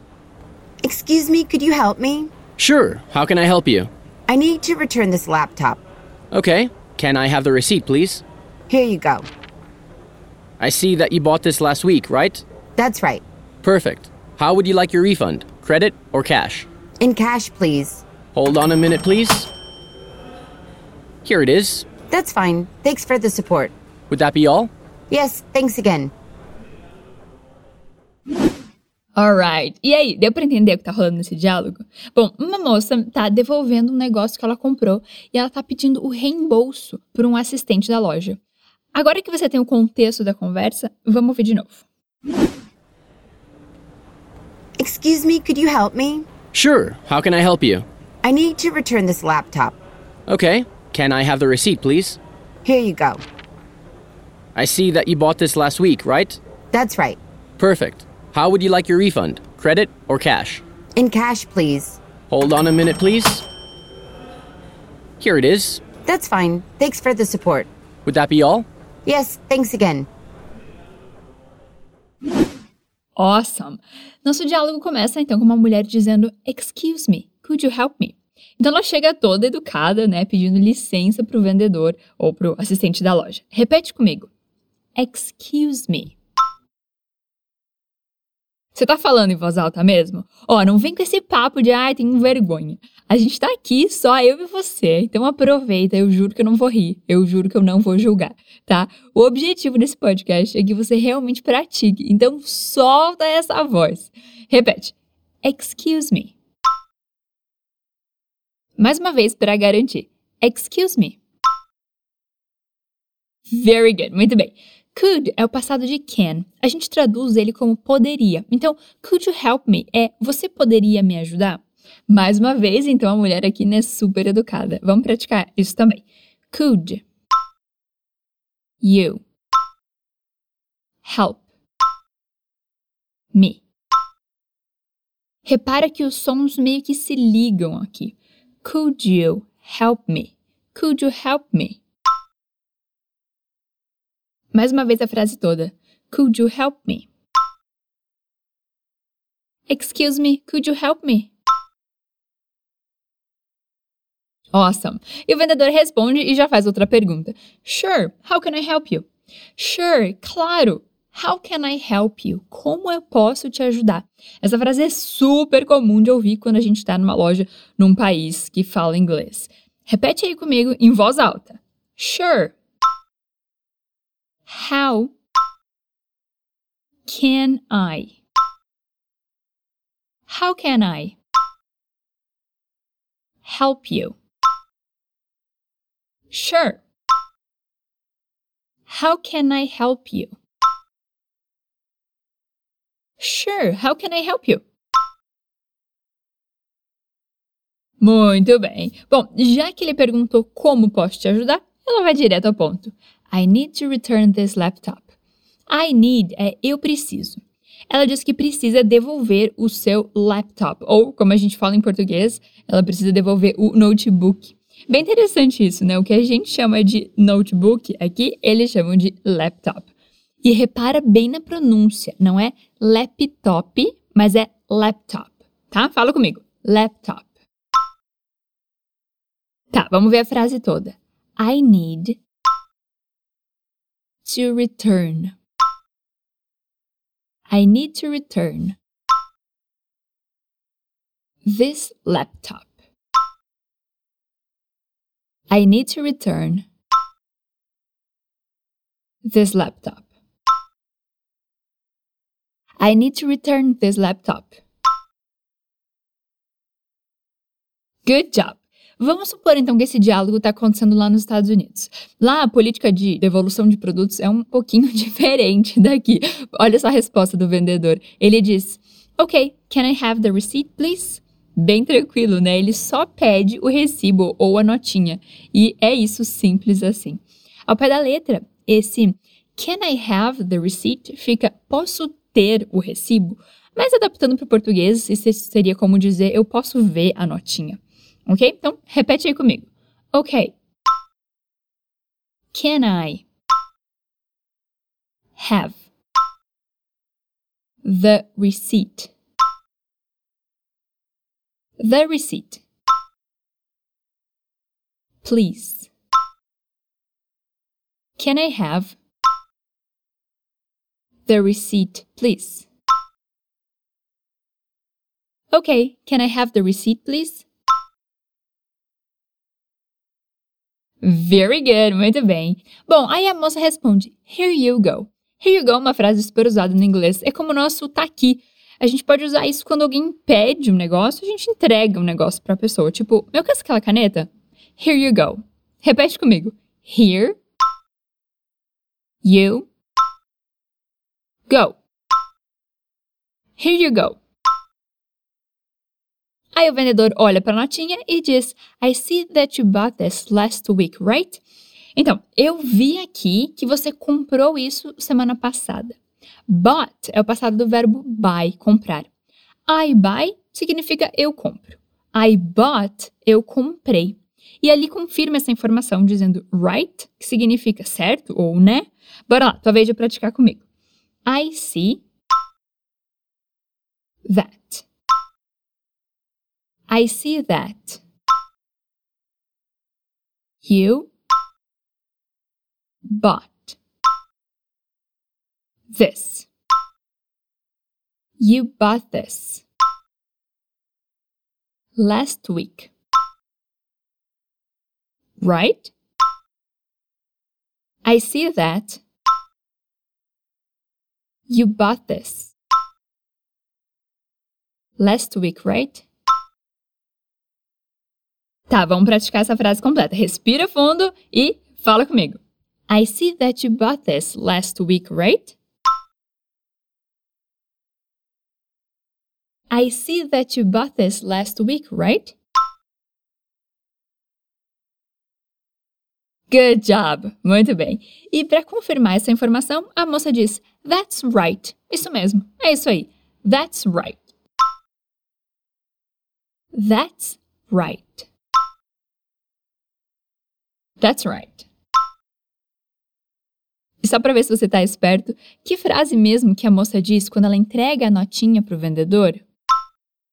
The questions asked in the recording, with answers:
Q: E só para ver se você está esperto, que frase mesmo que a moça diz quando ela entrega a notinha para o vendedor?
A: Here you go.